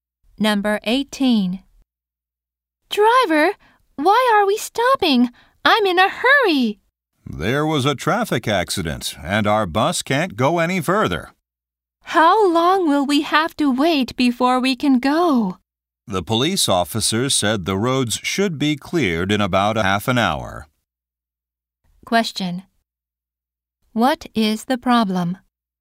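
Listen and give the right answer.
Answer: A traffic accident is stopping the bus.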